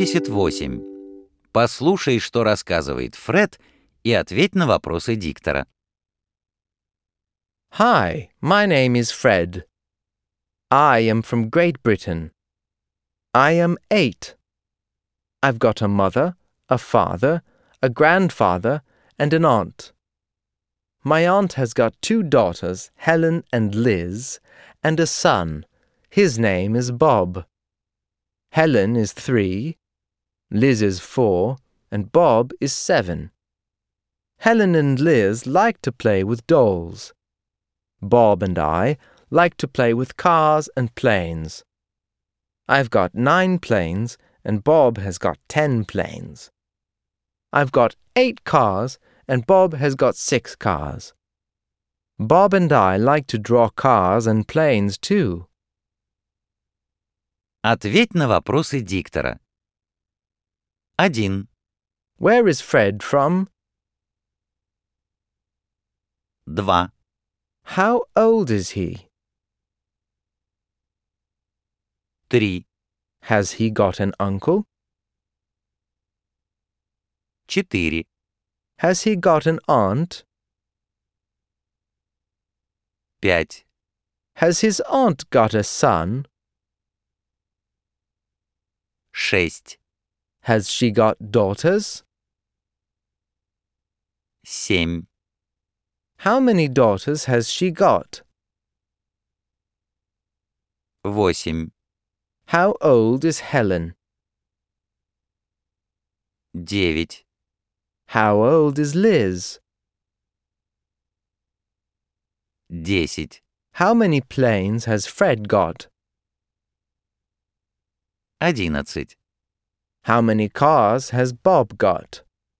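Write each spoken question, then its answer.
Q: Where is Fred from?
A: Great Britain

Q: Has he got an uncle?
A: No, he hasn't

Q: Has he got an aunt?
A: Yes, he has

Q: Has his aunt got a son?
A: Yes, she has

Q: Has she got daughters?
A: Yes, she has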